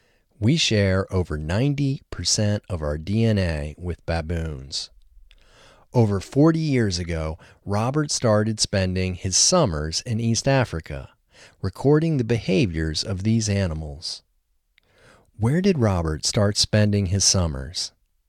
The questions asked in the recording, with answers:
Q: Where did Robert start spending his summers?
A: He started spending his summers in East Africa.